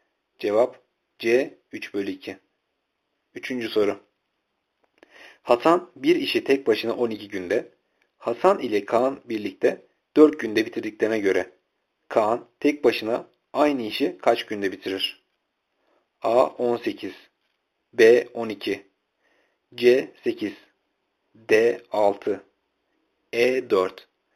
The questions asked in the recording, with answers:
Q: Kaan tek başına aynı işi kaç günde bitirir?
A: Cevap D 6.